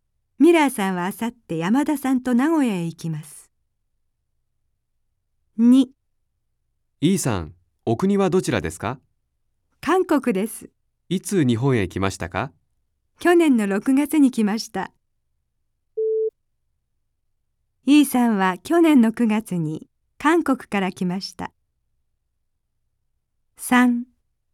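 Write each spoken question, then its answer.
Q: イーさんは去年の9月に韓国から来ました。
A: ×(9月ではなく6月に来た)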